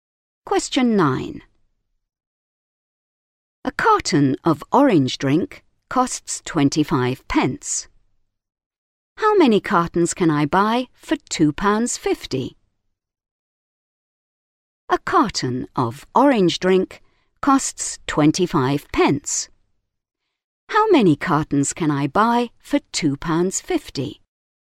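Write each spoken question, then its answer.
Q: How many cartons can I buy for £2.50?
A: 10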